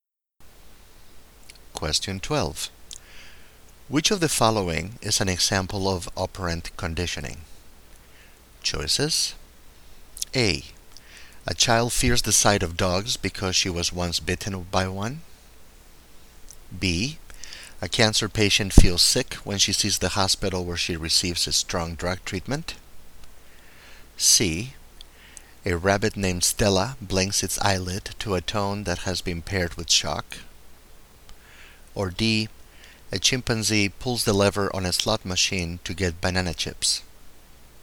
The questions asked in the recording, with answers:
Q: Which of the following is an example of operant conditioning?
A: And the correct choice is D.